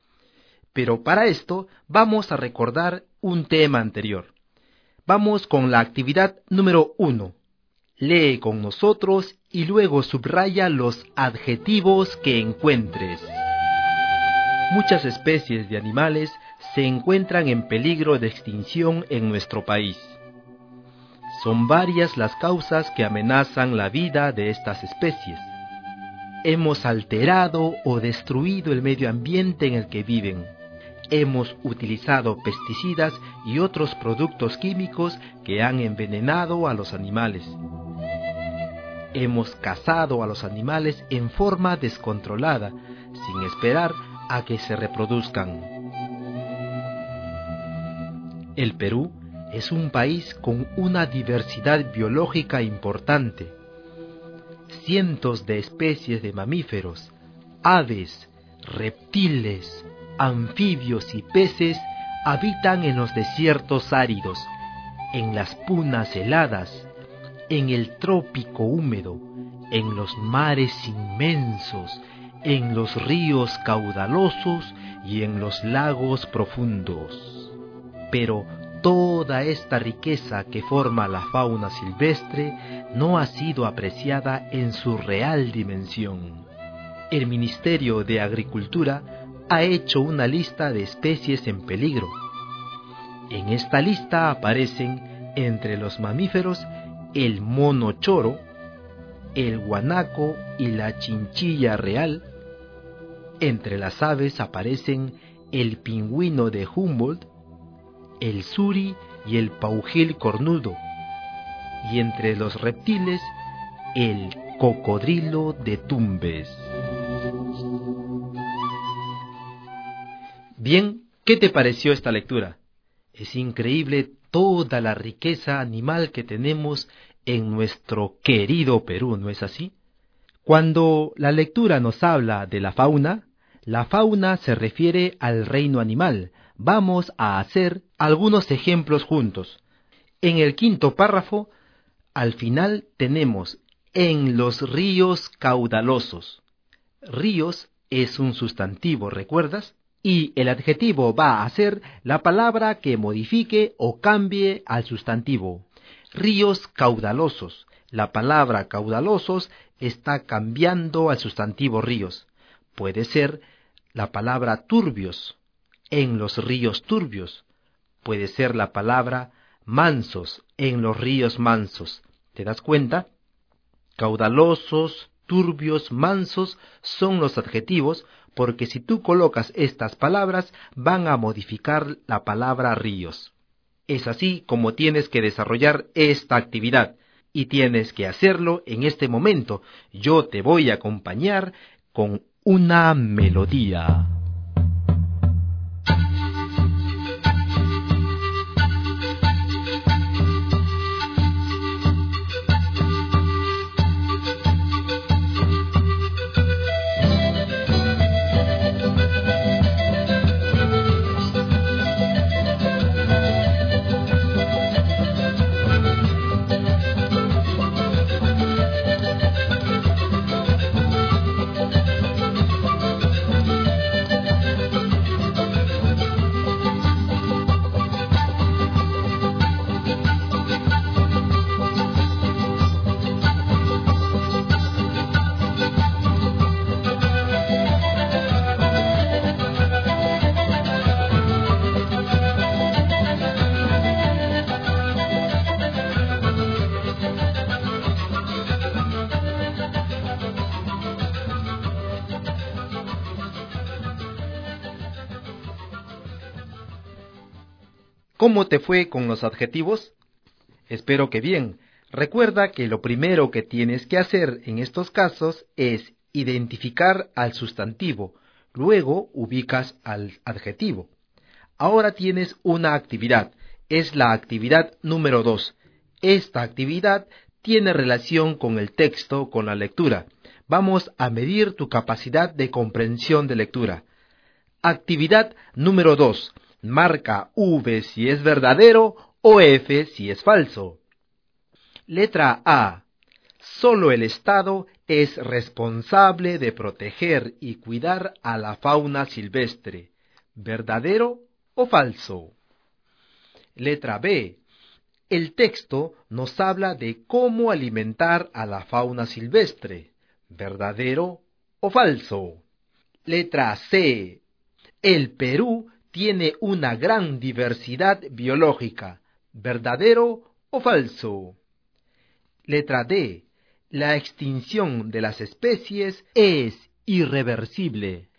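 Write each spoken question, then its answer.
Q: El texto nos habla de cómo alimentar a la fauna silvestre.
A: Falso

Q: El Perú tiene una gran diversidad biológica.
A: Verdadero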